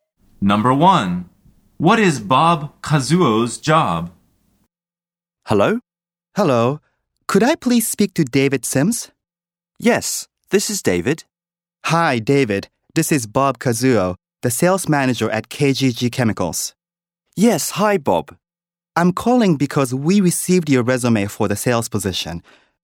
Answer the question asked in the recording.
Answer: The answer is he's the sales manager at KGG Chemicals.